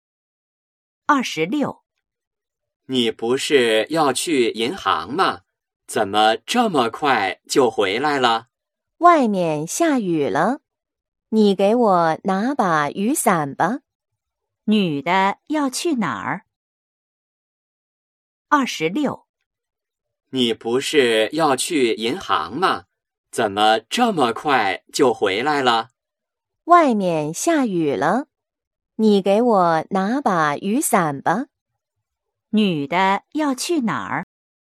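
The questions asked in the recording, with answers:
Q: 女的要去哪儿?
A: 银行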